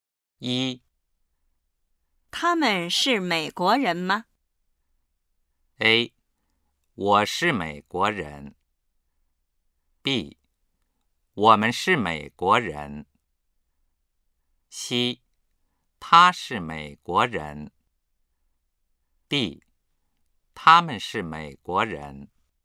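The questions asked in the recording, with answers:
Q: 他们是美国人吗?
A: D: 他们是美国人。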